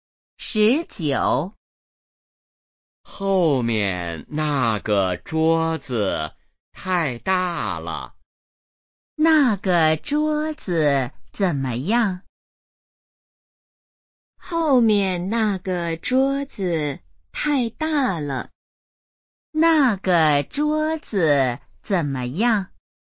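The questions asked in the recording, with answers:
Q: 那个桌子怎么样?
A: 太大了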